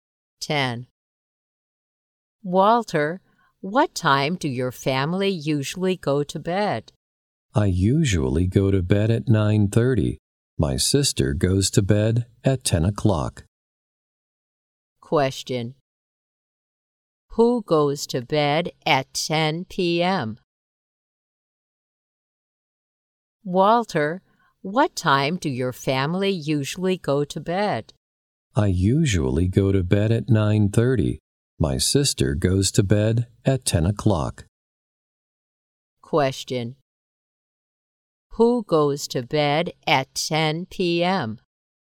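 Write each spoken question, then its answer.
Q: Who goes to bed at 10 p.m.?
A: Walter's sister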